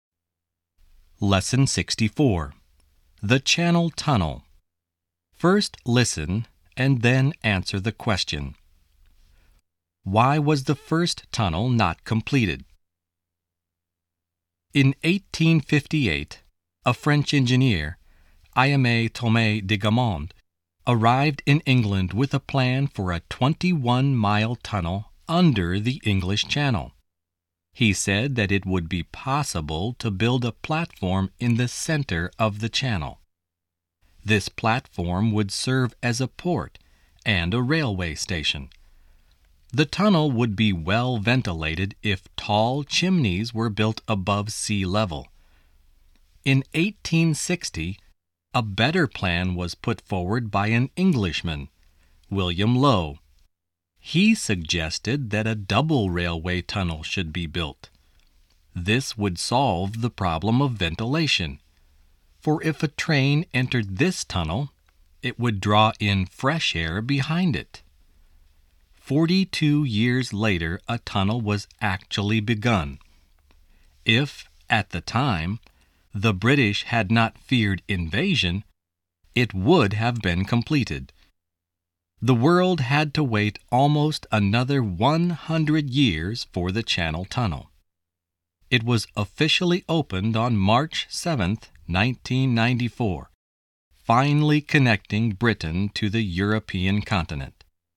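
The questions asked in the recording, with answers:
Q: Why was the first tunnel not completed?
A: Because the British feared invasion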